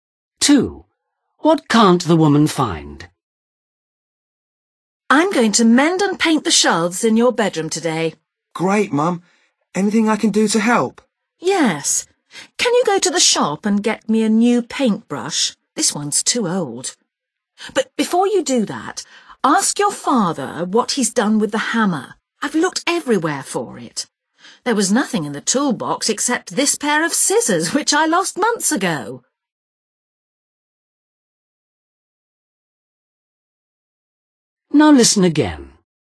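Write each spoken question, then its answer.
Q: What can't the woman find?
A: the hammer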